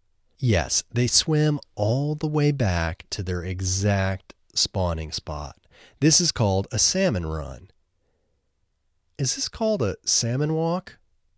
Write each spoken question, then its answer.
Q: Is this called a salmon walk?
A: No, this isn't called a salmon walk.